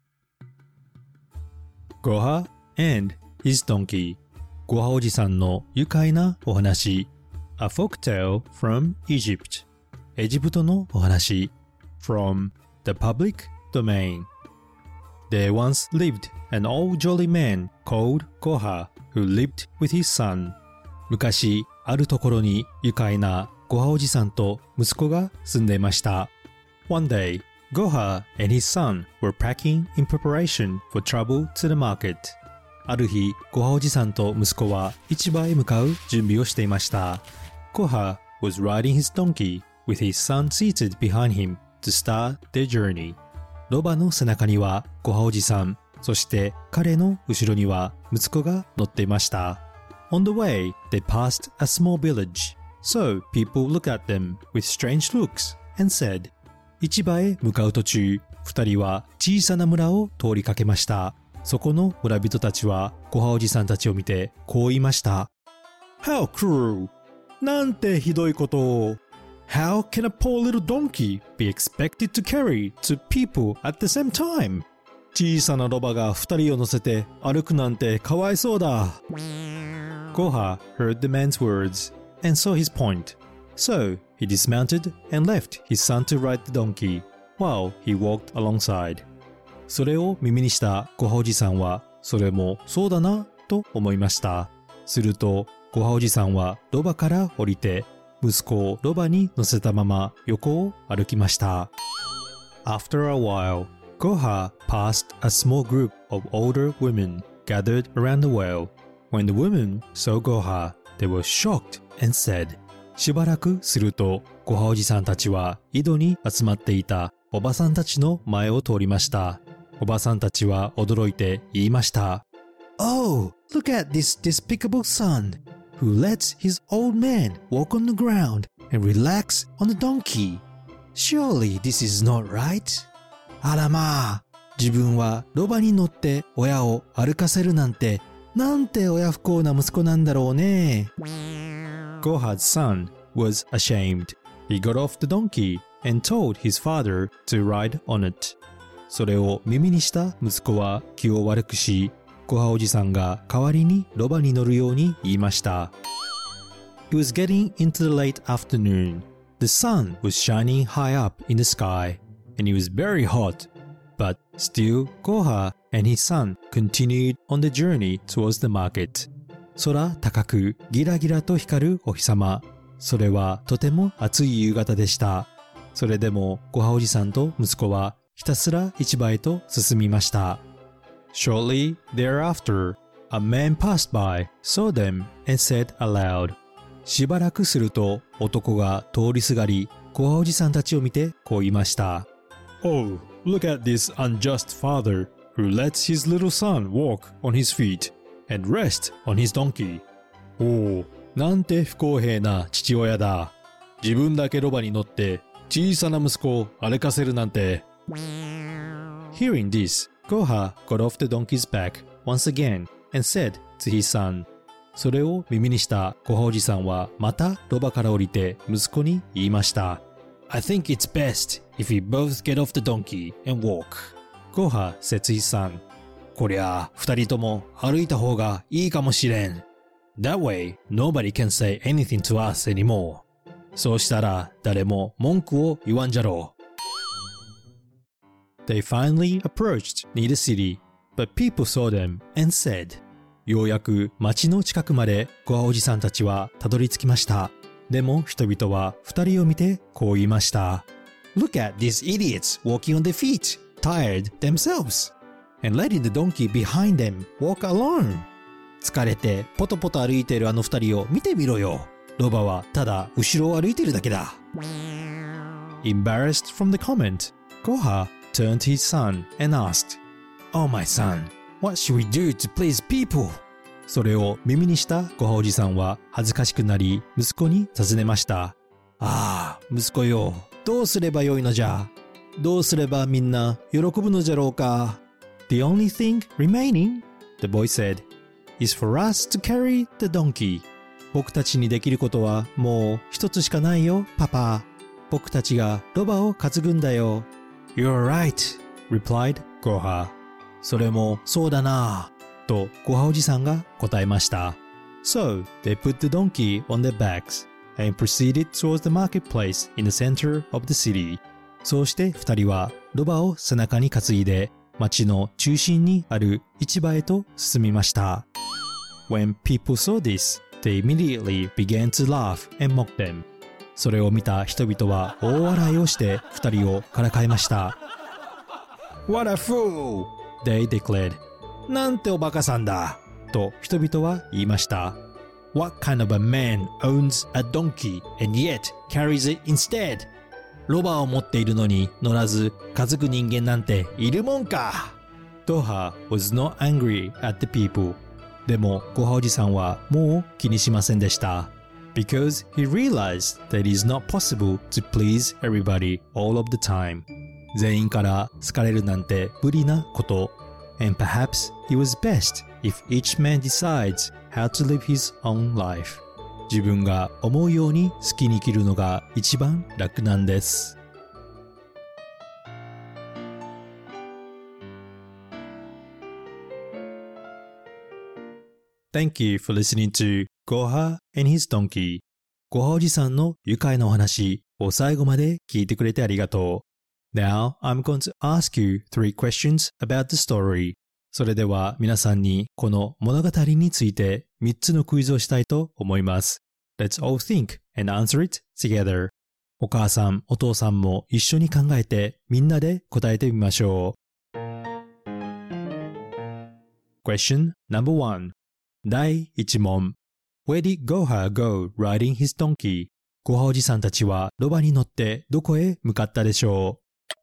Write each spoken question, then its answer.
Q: Where did Goha go riding his donkey?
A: They were on a journey to the market